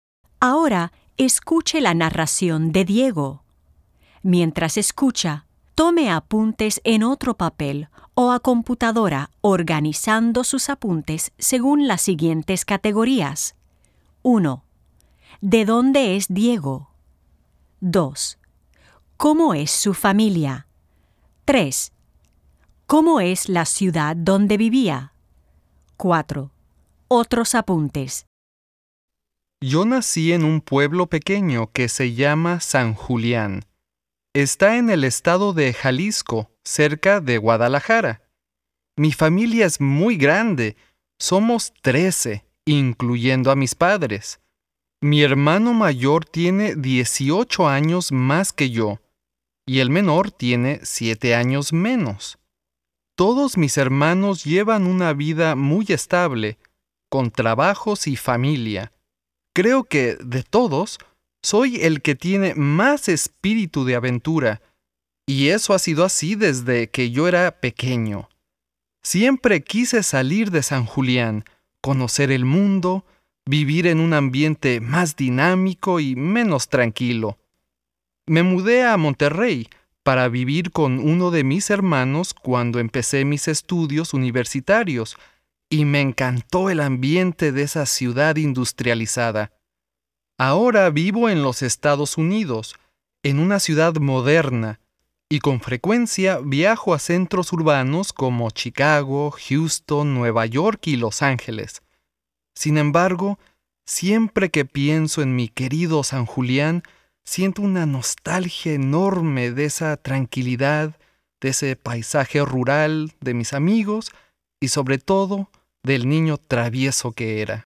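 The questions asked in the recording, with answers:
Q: ¿De dónde es Diego?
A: De San Julián, un pueblo pequeño en Jalisco, cerca de Guadalajara

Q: ¿Cómo es su familia?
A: Muy grande: son 13, incluyendo a sus padres

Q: ¿Cómo es la ciudad donde vivía?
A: Un pueblo pequeño, tranquilo y rural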